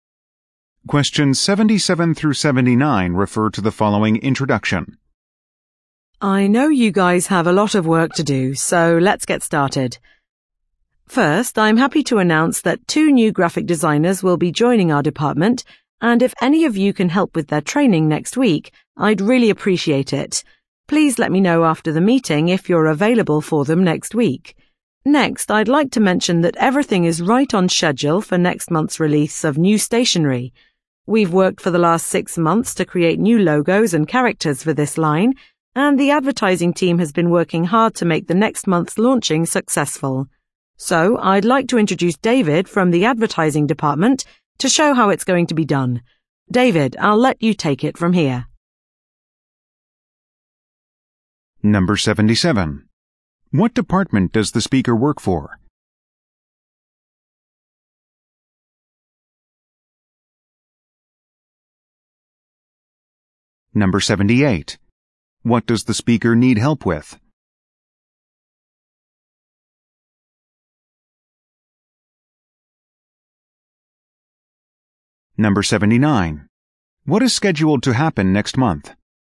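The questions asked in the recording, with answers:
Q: What does the speaker need help with?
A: Training the new graphic designers

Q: What is scheduled to happen next month?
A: The release of new stationery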